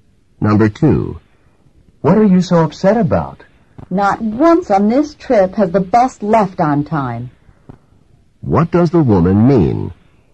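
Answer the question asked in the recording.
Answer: The bus has always left late on this trip.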